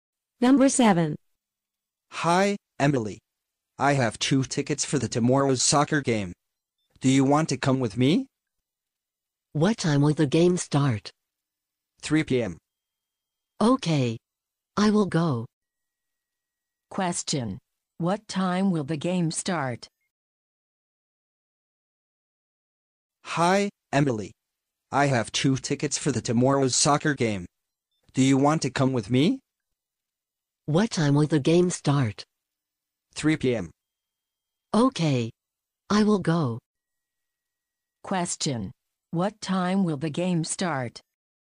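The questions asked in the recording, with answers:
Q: What time will the game start?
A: 3 p.m.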